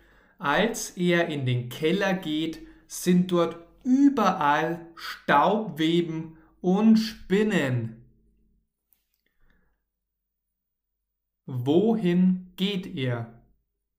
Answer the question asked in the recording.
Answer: In den Keller. Mirko geht in den Keller.